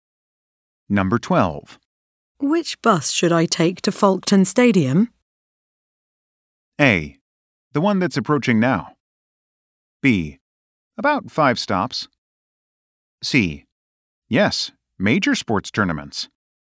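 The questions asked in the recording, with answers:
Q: Which bus should I take to Folkestone Stadium?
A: A: The one that's approaching now.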